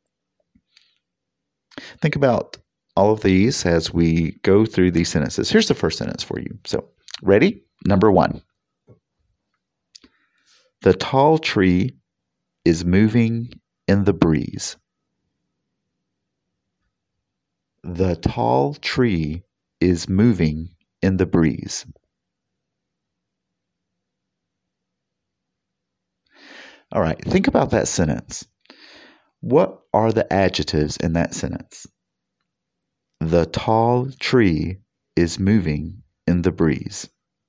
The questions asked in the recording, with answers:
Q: What are the adjectives in that sentence?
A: Did you pick out the word tall?